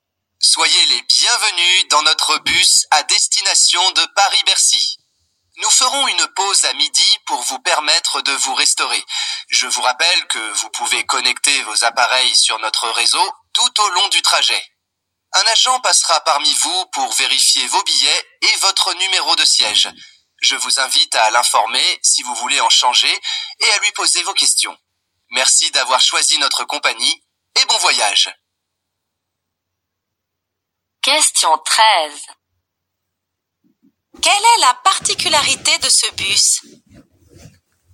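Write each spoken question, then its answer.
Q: Quelle est la particularité de ce bus?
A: On peut connecter ses appareils au réseau pendant tout le trajet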